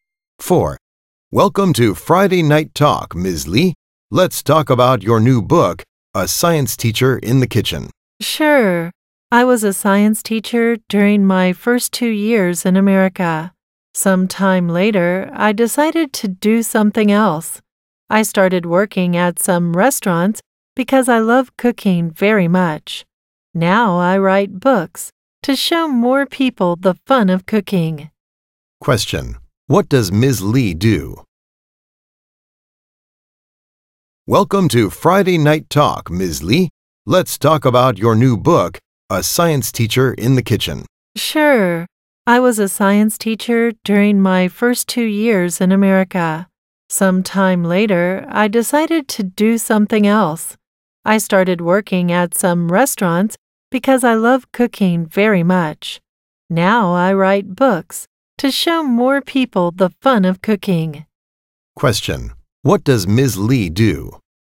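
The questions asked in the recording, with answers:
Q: What does Ms. Lee do?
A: She writes books (a writer)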